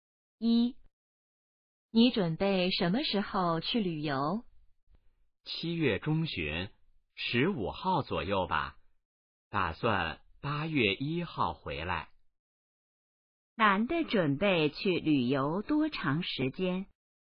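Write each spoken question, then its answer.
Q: 男的准备去旅游多长时间?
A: 半个月左右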